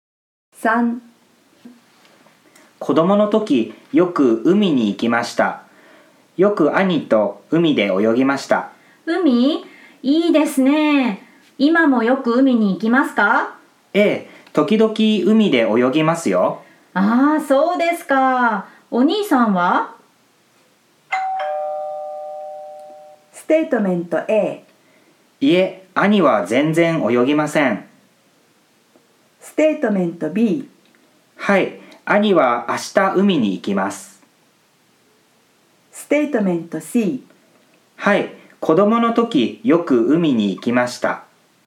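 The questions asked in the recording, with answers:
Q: ああ、そうですか。お兄さんは?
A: A: いえ、兄は全然泳ぎません。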